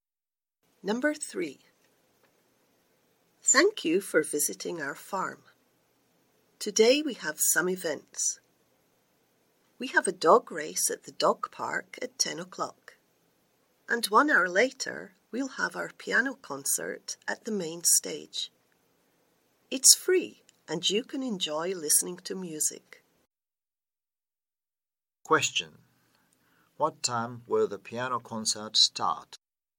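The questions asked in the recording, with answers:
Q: What time will the piano concert start?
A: At 11 o'clock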